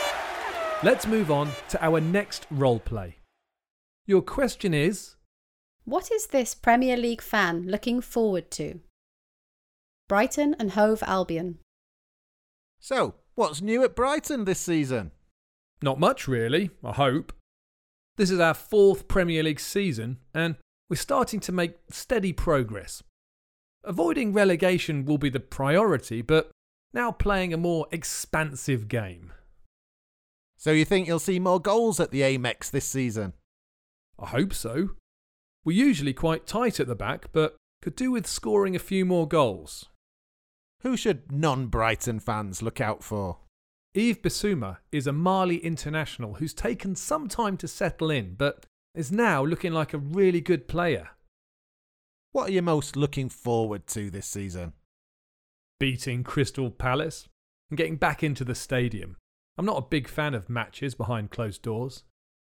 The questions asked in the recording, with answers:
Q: what is this Premier League fan looking forward to?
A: He said beating Crystal Palace, because Palace are Brighton's main rivals and also watching matches at stadiums.